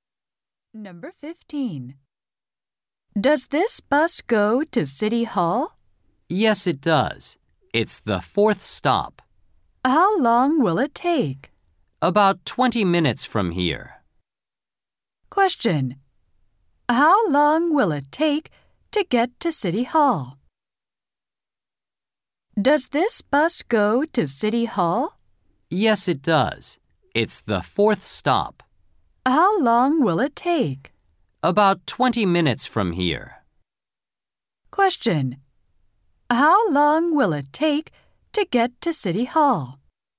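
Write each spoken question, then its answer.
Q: How long will it take to get to City Hall?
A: About 20 minutes.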